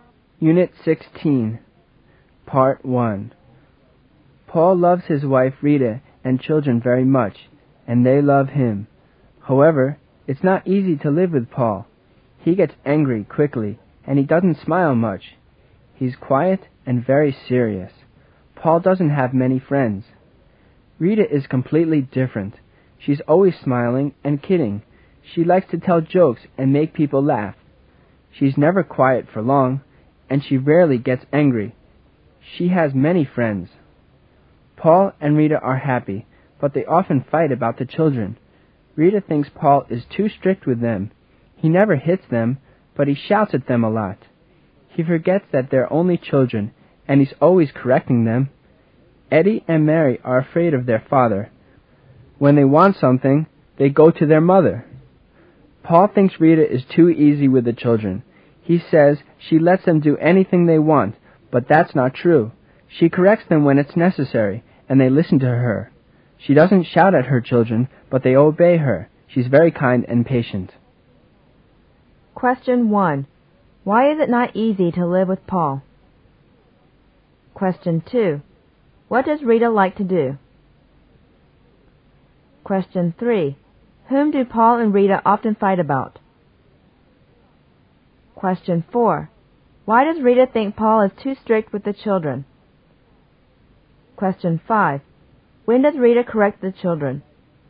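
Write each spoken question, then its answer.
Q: Why is it not easy to live with Paul?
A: He gets angry quickly, doesn't smile much, and is quiet and very serious

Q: What does Rita like to do?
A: Tell jokes and make people laugh

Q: Whom do Paul and Rita often fight about?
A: The children

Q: Why does Rita think Paul is too strict with the children?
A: He shouts at them a lot and is always correcting them

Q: When does Rita correct the children?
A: When it's necessary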